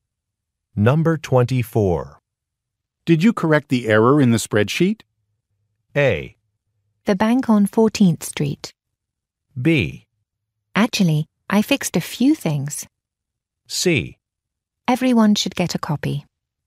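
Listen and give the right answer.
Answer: B: Actually, I fixed a few things.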